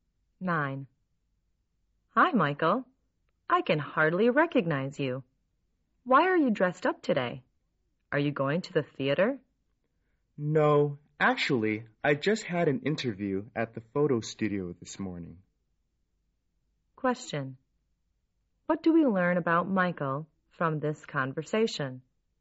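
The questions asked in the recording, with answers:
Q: What do we learn about Michael from this conversation?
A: He had an interview at a photo studio this morning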